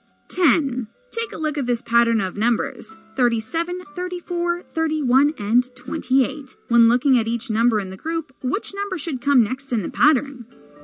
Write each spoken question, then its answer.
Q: When looking at each number in the group, which number should come next in the pattern?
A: If you guess the number 25, you're absolutely correct.